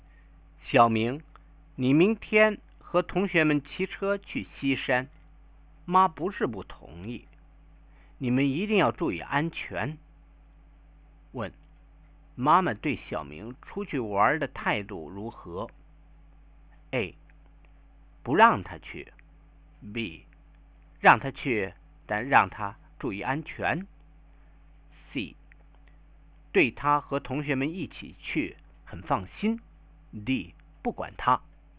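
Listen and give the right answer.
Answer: B: 让他去,但让他注意安全。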